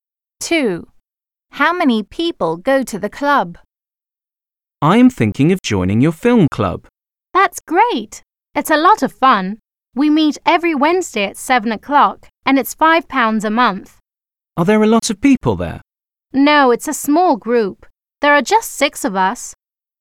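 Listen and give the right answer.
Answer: Six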